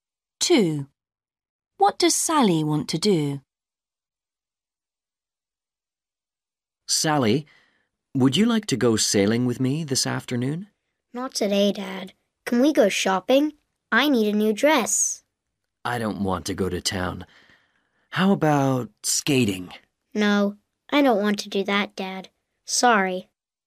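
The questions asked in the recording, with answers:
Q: What does Sally want to do?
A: go shopping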